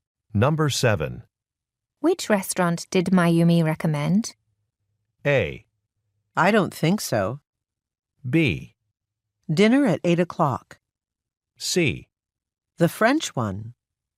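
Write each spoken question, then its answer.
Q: Which restaurant did Mayumi recommend?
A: C: The French one.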